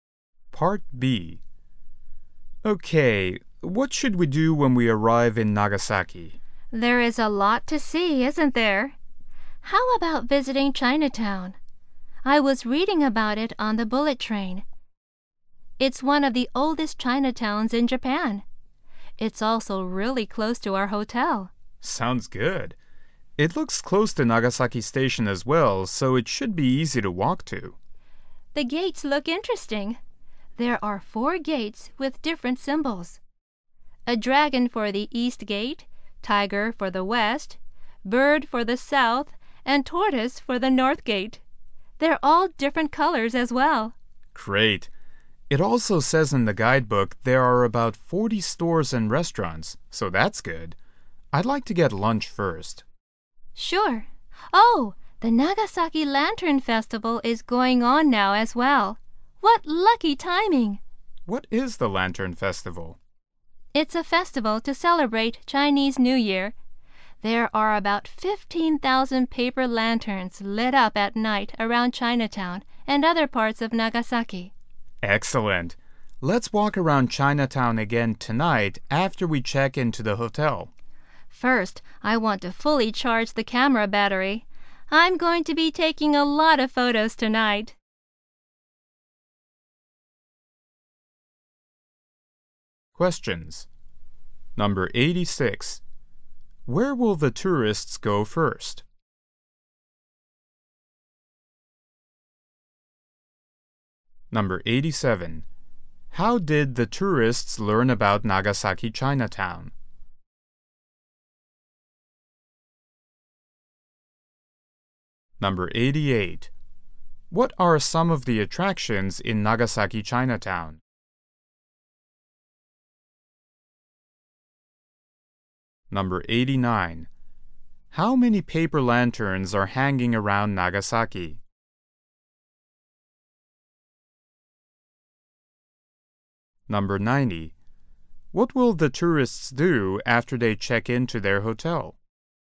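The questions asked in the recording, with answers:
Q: Where will the tourists go first?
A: To Chinatown, for lunch

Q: What are some of the attractions in Nagasaki Chinatown?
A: Four gates with different symbols and about 40 stores and restaurants

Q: How many paper lanterns are hanging around Nagasaki?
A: About 15,000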